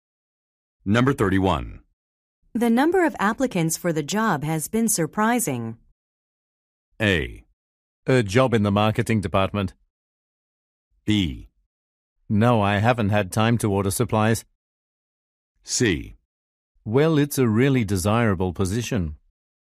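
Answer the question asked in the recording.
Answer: C: Well, it's a really desirable position.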